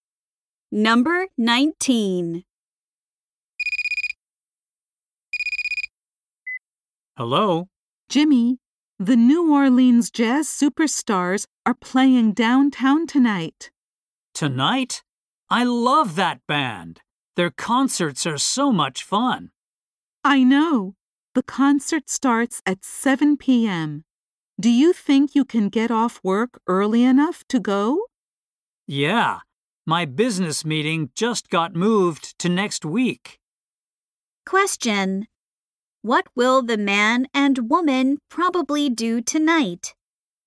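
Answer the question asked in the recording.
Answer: Go to a jazz concert.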